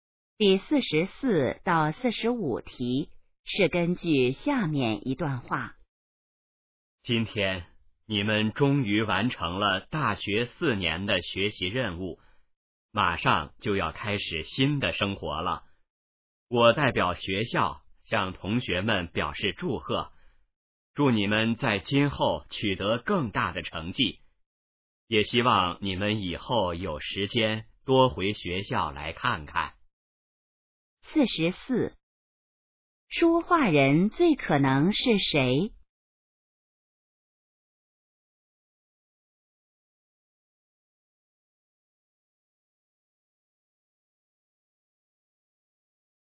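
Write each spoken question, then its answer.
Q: 这段话最可能是在什么时候说的?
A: 大学毕业时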